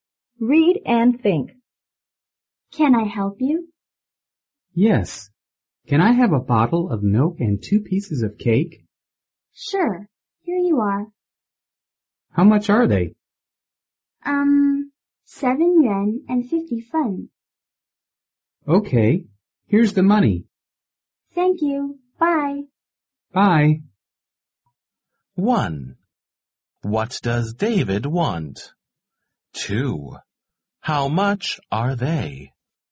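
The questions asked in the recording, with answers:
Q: What does David want?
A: A bottle of milk and 2 pieces of cake.

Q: How much are they?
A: 7 yuan and 50 fen.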